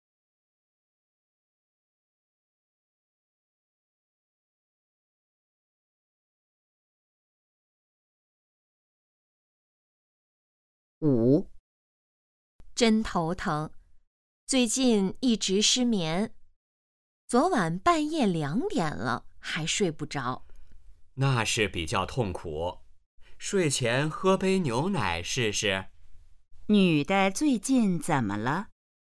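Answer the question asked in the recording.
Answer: 失眠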